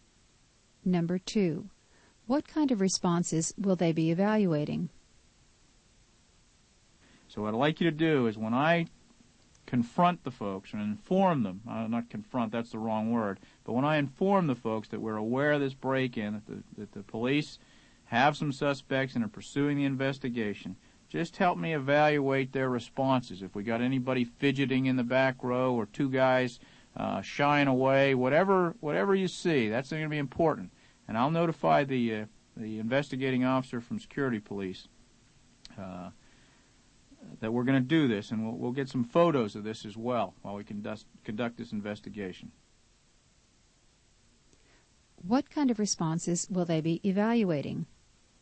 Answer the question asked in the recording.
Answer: They will try to see if anyone fidgets or tries to hide.